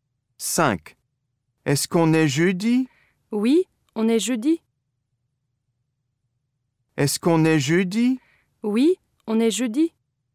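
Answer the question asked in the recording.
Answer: oui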